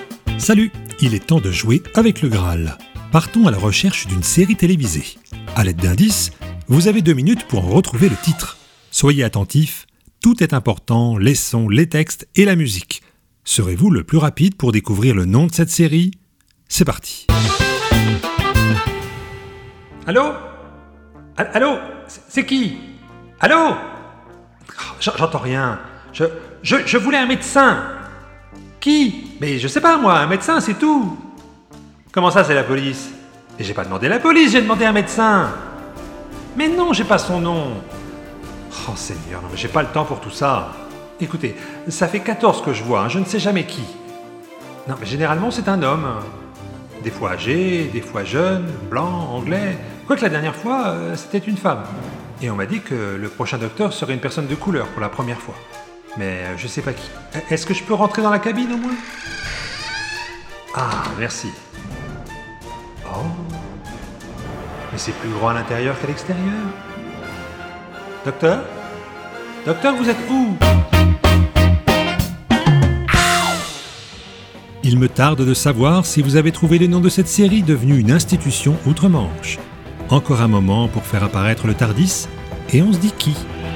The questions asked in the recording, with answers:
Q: Serez-vous le plus rapide pour découvrir le nom de cette série ?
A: d'où le titre de la série « Docteur Who »